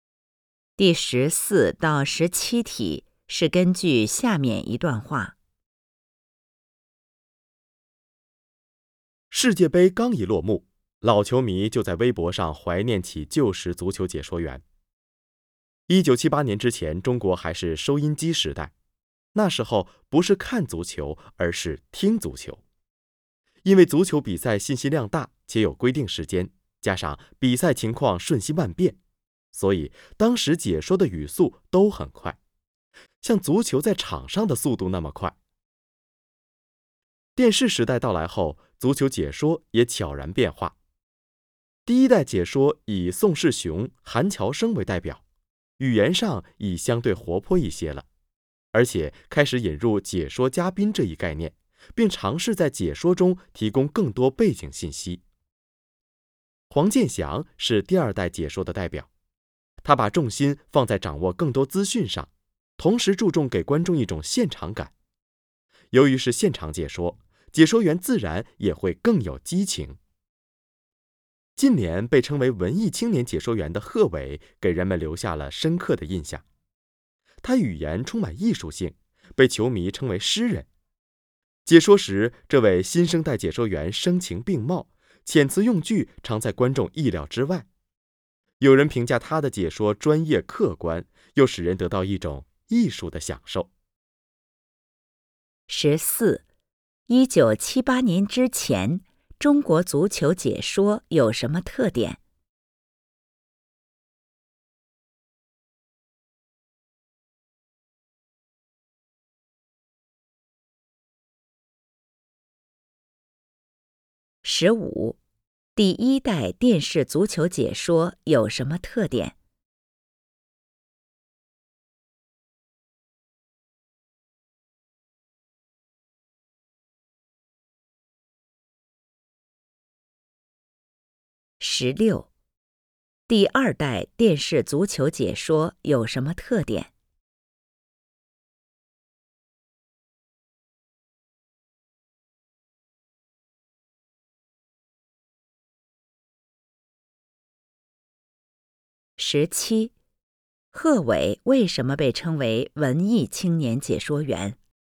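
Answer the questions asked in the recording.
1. 靠收音机听,解说语速很快
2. 语言相对活泼,引入解说嘉宾,提供更多背景信息
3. 重视掌握更多资讯,注重给观众现场感
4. 他的语言充满艺术性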